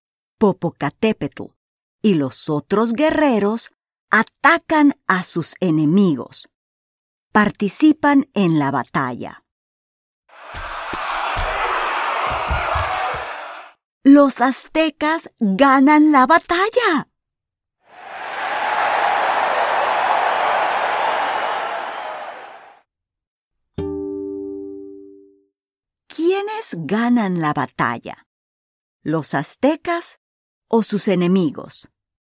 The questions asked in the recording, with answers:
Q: ¿Los aztecas o sus enemigos?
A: Sí, los aztecas ganan la batalla.